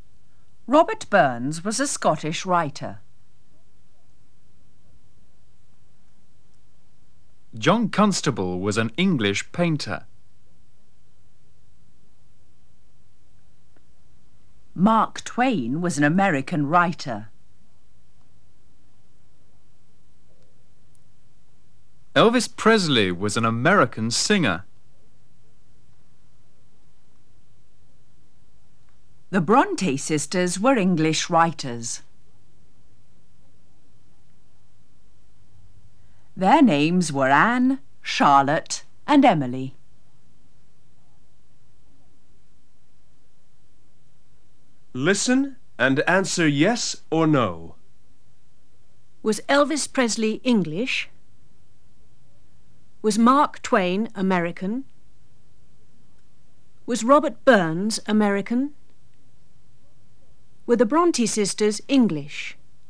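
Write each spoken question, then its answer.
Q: Was Elvis Presley English?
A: No

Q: Was Mark Twain American?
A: Yes

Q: Was Robert Burns American?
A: No

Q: Were the Bronte sisters English?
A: Yes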